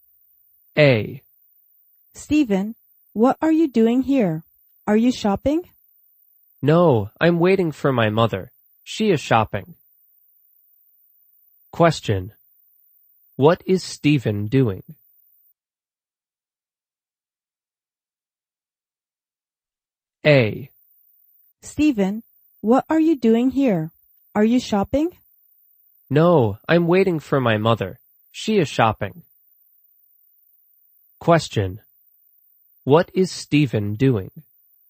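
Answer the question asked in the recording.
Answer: Waiting for his mother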